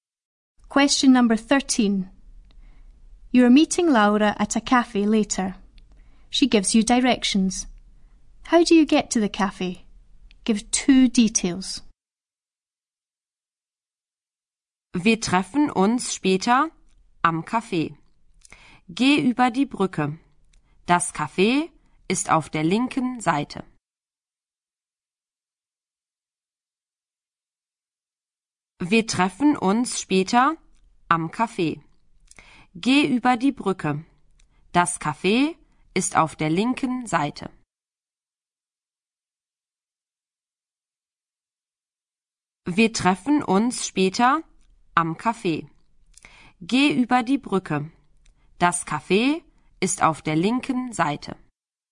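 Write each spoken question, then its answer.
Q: How do you get to the cafe?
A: Go over the bridge; the cafe is on the left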